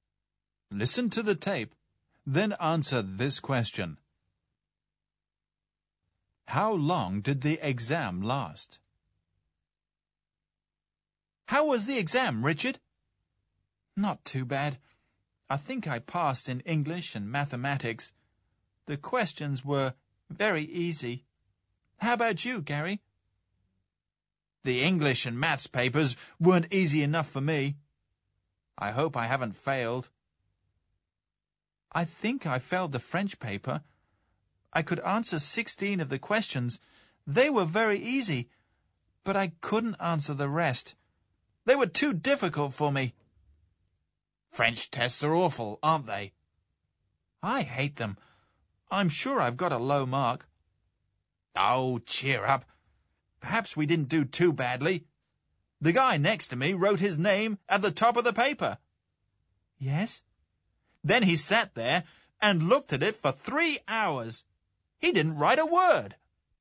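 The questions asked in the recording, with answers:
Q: How long did the exam last?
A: 3 hours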